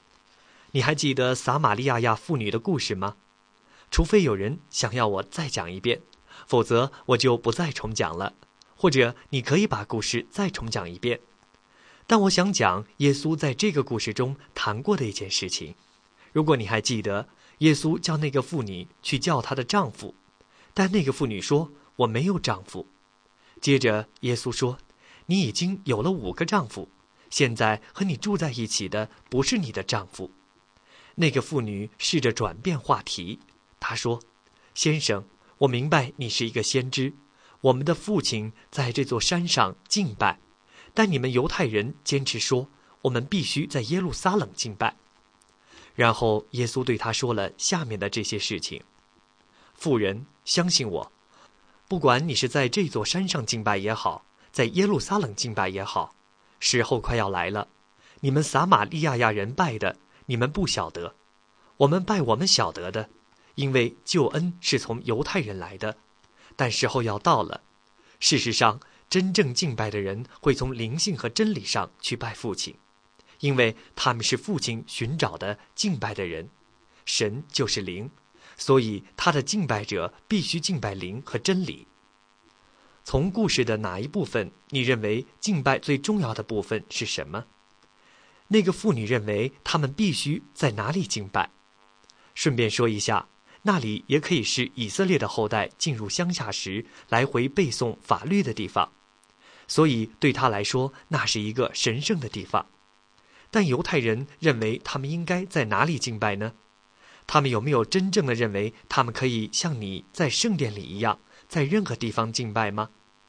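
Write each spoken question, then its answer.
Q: 那个妇女认为他们必须在哪里敬拜?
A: 在这座山上

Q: 但犹太人认为他们应该在哪里敬拜呢?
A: 在耶路撒冷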